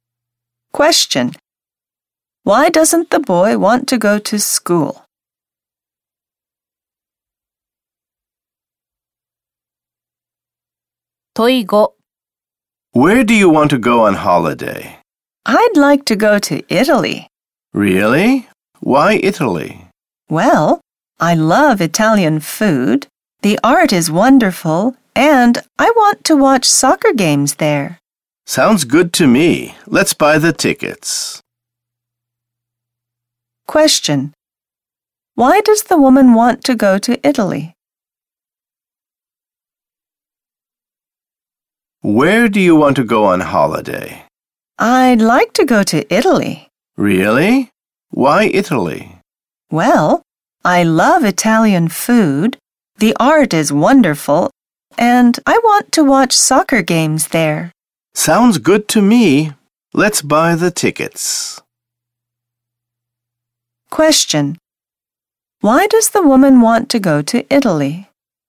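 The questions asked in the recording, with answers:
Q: Why does the woman want to go to Italy?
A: She loves Italian food and art and wants to watch soccer games there.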